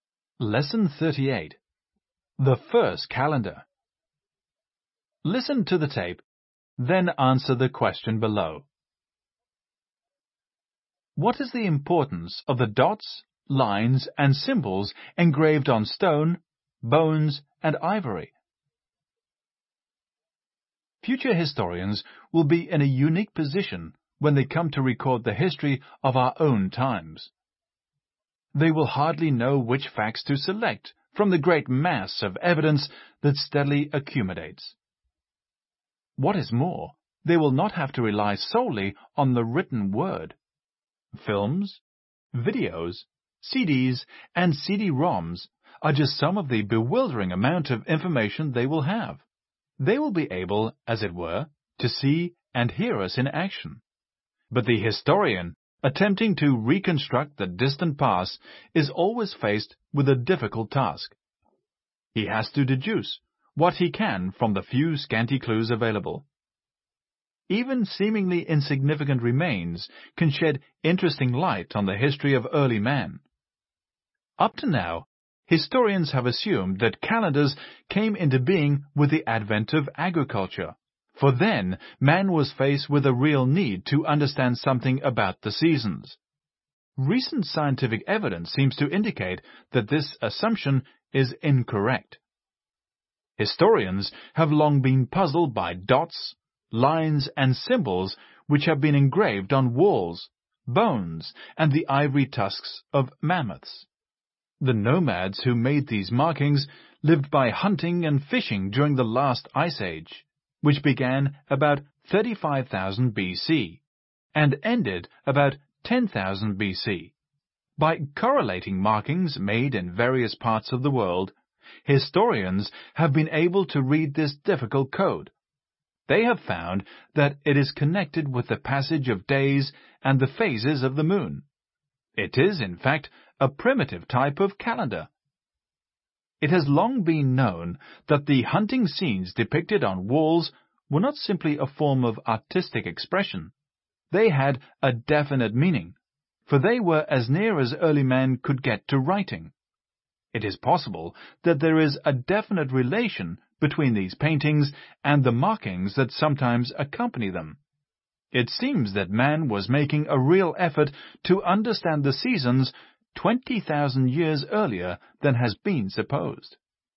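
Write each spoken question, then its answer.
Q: What is the importance of the dots, lines, and symbols engraved on stone, bones, and ivory?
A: They are a primitive calendar, connected with the passage of days and the phases of the moon, showing man tried to understand the seasons 20,000 years earlier than supposed.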